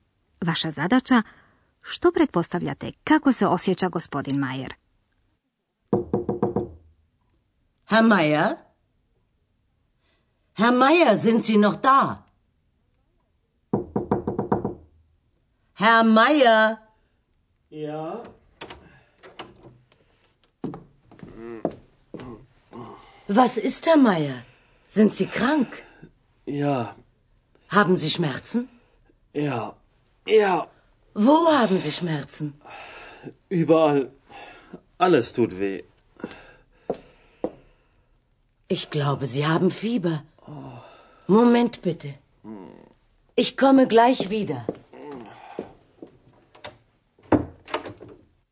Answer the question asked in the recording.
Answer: Vjerojatno ste po stenjanju prepoznali da gospodinu Majeru nije dobro, on je bolestan.